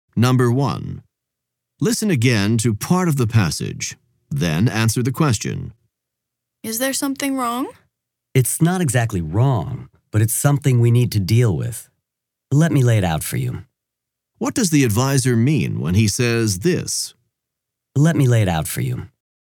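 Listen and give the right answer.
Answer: He is going to explain the situation to the student clearly.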